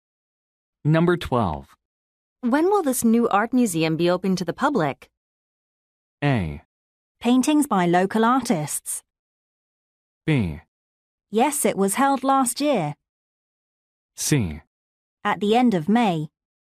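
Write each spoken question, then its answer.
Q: When will this new art museum be open to the public?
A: C: At the end of May.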